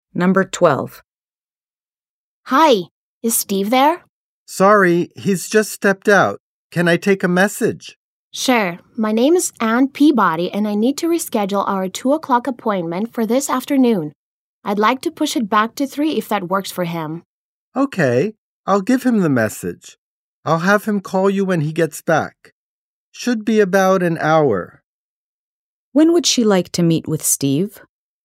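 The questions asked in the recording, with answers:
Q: When would she like to meet with Steve?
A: At 3 o'clock this afternoon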